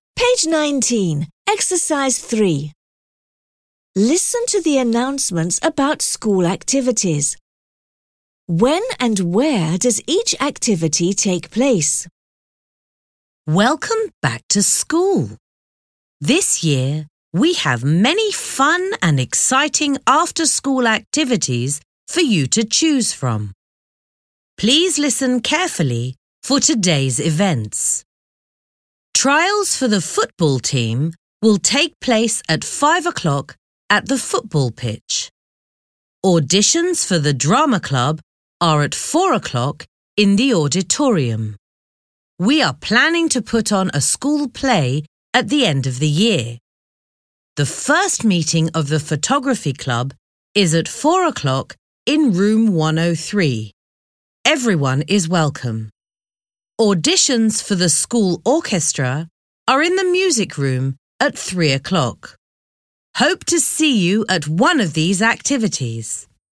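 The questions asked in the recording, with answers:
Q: When and where does each activity take place?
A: Football trials: 5 o'clock, football pitch; drama auditions: 4 o'clock, auditorium; photography club: 4 o'clock, room 103; orchestra auditions: 3 o'clock, music room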